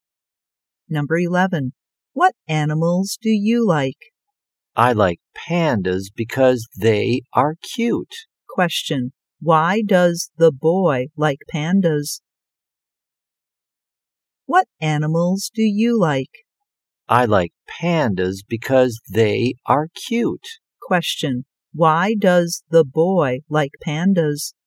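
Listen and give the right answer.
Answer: Because they are cute.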